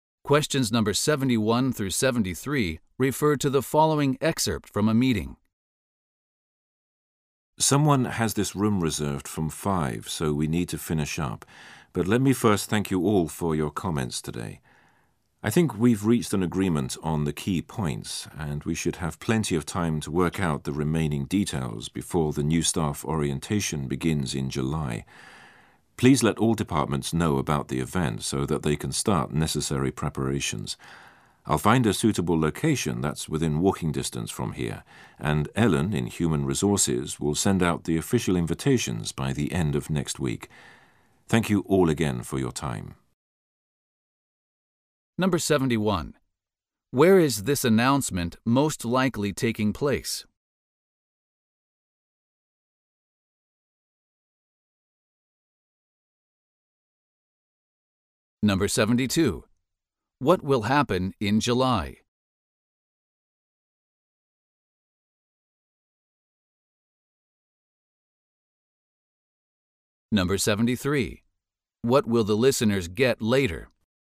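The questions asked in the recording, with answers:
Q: Where is this announcement most likely taking place?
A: In a meeting room at the office

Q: What will happen in July?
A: A new staff orientation will begin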